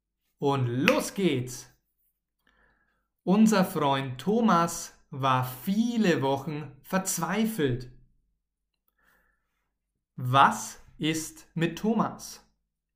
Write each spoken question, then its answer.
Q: Was ist mit Thomas?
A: Er war viele Wochen verzweifelt.